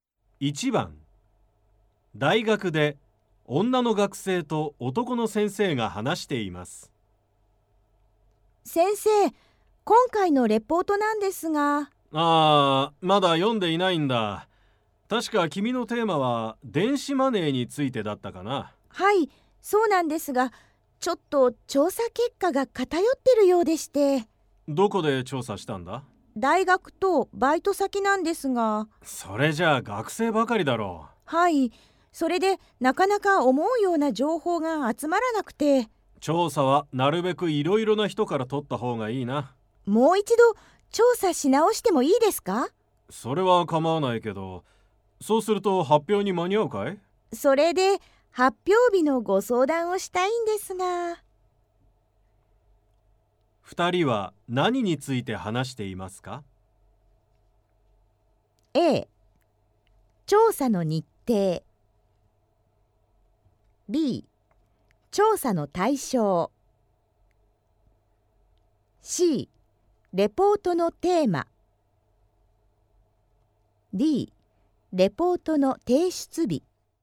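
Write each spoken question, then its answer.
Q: 二人は何について話していますか?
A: B: 調査の対象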